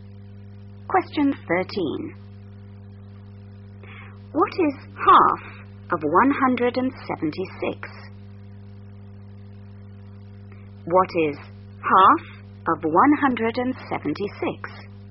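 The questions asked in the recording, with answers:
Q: What is half of 176?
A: 88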